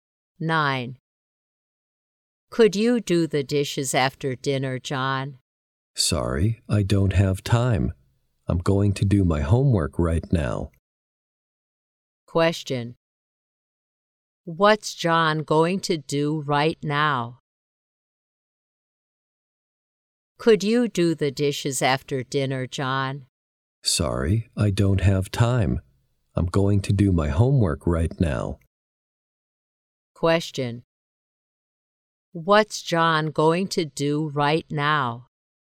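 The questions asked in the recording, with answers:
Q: What's John going to do right now?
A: Do his homework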